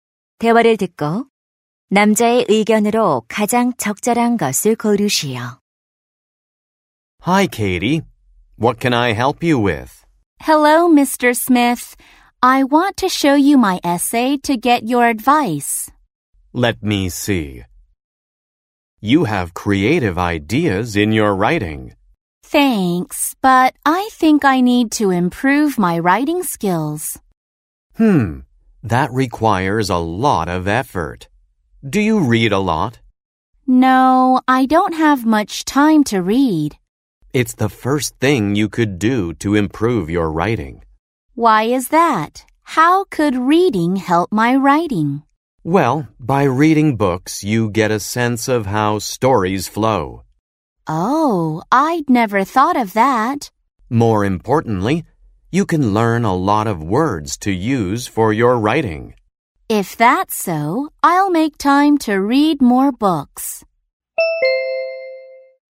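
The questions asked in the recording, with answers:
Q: 대화를 듣고 남자의 의견으로 가장 적절한 것을 고르시오.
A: 독서는 글쓰기 실력 향상에 도움이 된다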